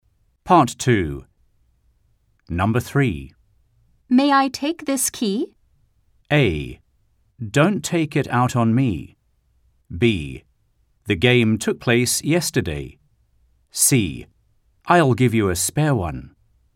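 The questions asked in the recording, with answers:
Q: May I take this key?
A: C: I'll give you a spare one.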